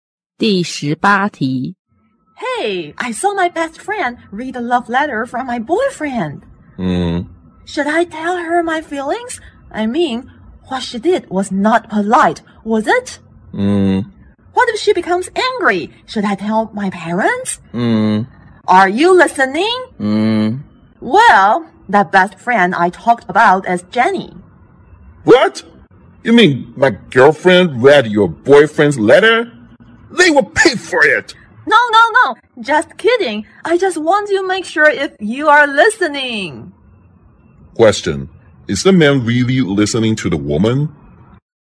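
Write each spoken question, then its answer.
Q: is the man really listening to the woman?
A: Yes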